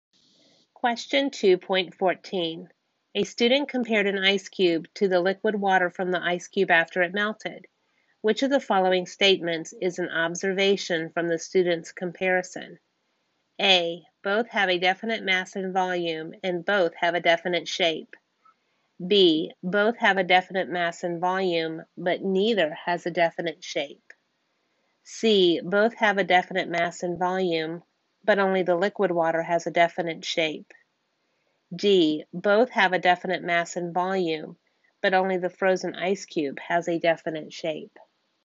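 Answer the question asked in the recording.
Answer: D: Both have a definite mass and volume, but only the frozen ice cube has a definite shape.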